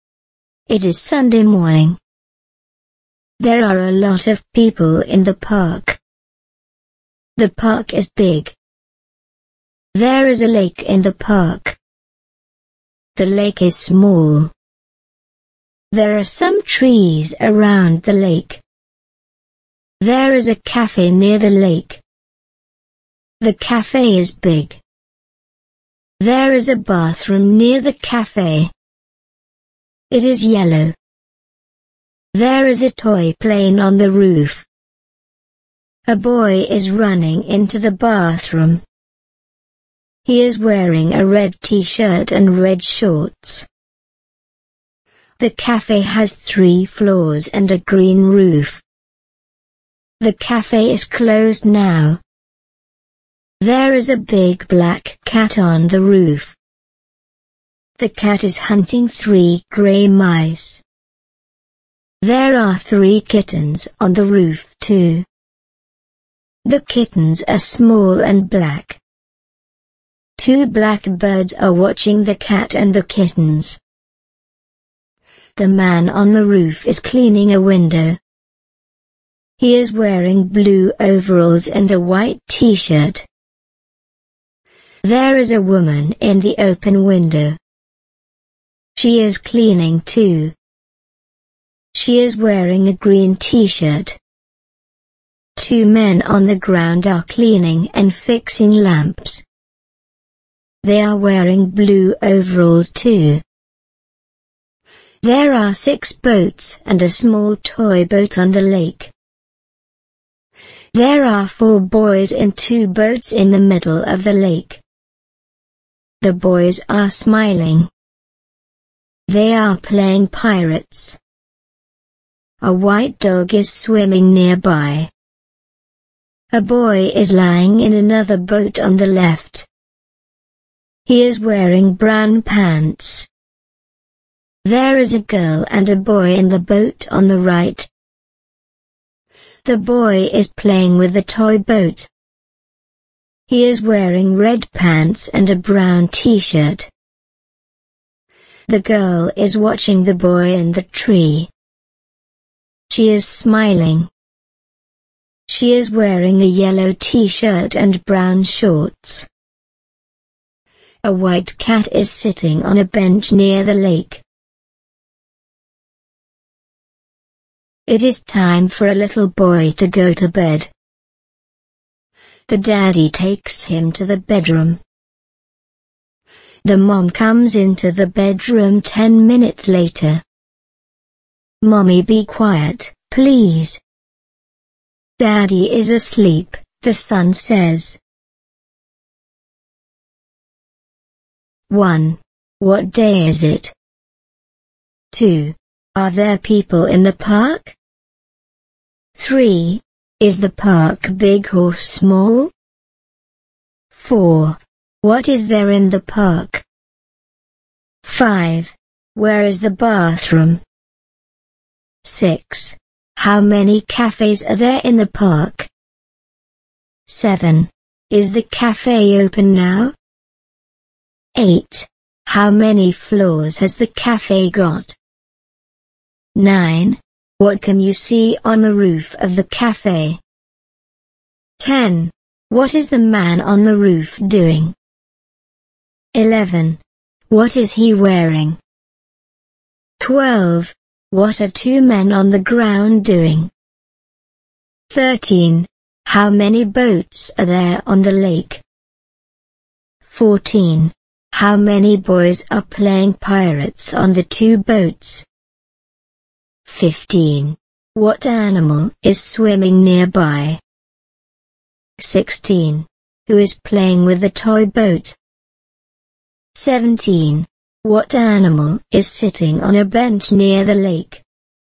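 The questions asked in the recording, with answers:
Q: What day is it?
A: Sunday

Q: Are there people in the park?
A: Yes, a lot of people

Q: Is the park big or small?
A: Big

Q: What is there in the park?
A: A lake

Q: Where is the bathroom?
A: Near the cafe

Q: Is the cafe open now?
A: No, it is closed

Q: How many floors has the cafe got?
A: Three

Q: What is the man on the roof doing?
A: Cleaning a window

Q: What is he wearing?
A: Blue overalls and a white t-shirt

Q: What are two men on the ground doing?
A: Cleaning and fixing lamps

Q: How many boats are there on the lake?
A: Six boats and a small toy boat

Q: How many boys are playing pirates on the two boats?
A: Four

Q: What animal is swimming nearby?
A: A white dog

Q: Who is playing with the toy boat?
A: The boy in the boat on the right

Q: What animal is sitting on a bench near the lake?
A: A white cat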